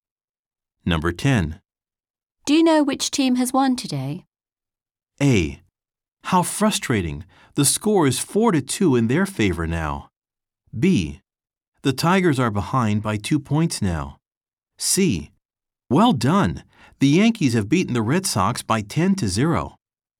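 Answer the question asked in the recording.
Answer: C: Well done! The Yankees have beaten the Red Sox by 10-0.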